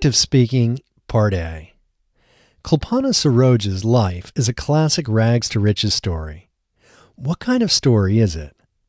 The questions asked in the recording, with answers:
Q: What kind of story is it?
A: It is a classic rags-to-riches story.